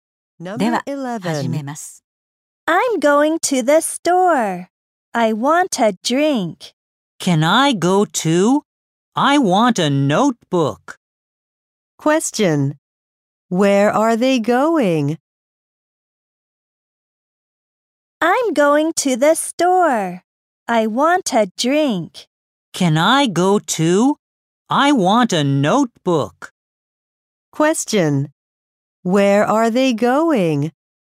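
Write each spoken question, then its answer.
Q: Where are they going?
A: To the store.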